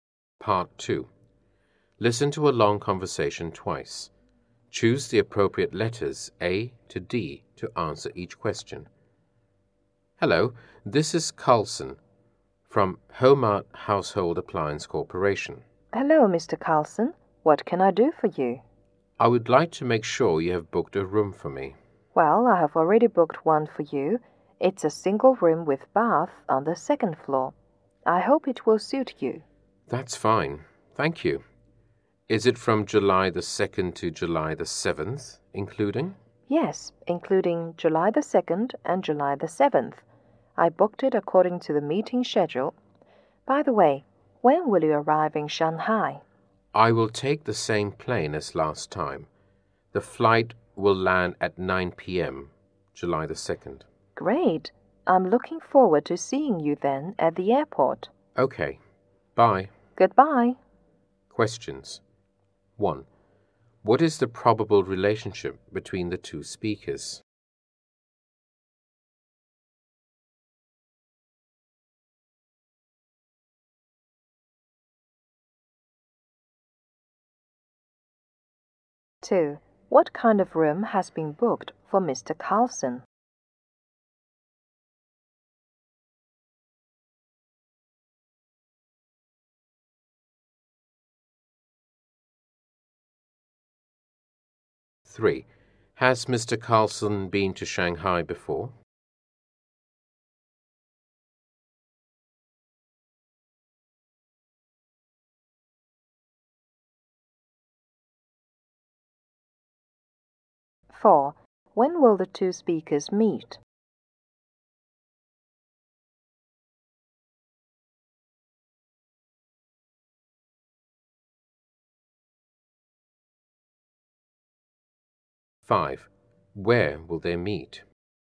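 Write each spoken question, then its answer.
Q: What kind of room has been booked for Mr. Carlson?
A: A single room with bath on the second floor

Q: Has Mr. Carlson been to Shanghai before?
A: Yes

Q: When will the two speakers meet?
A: At 9 p.m. on July 2nd

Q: Where will they meet?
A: At the airport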